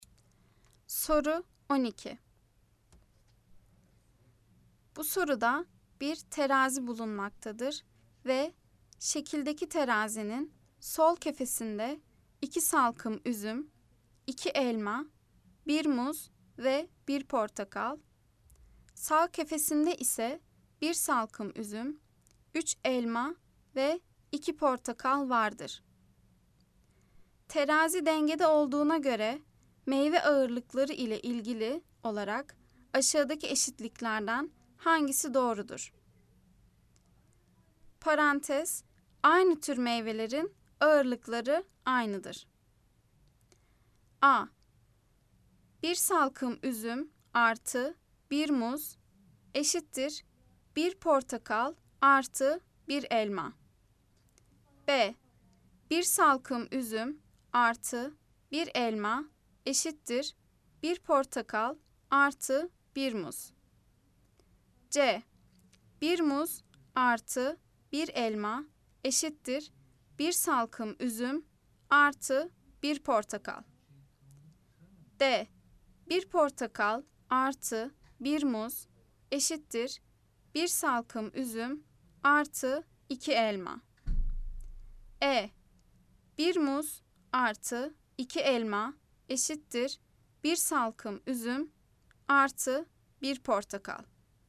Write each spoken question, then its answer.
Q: Terazi dengede olduğuna göre meyve ağırlıkları ile ilgili olarak aşağıdaki eşitliklerden hangisi doğrudur?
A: Cevap Adana 1 salkım üzüm artı 1 muz eşittir 1 portakal artı 1 elma.